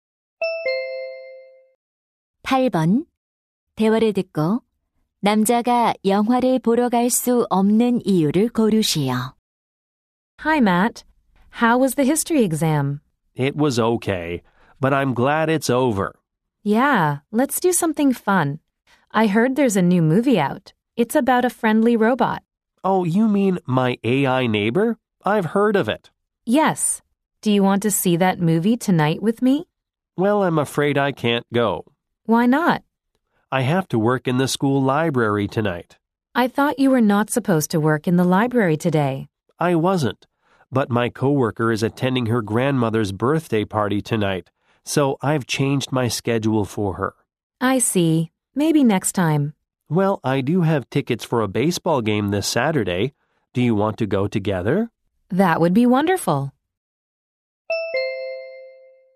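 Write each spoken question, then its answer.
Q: 대화를 듣고 남자가 영화를 보러 갈 수 없는 이유를 고르시오.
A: 학교 도서관에서 일해야 해서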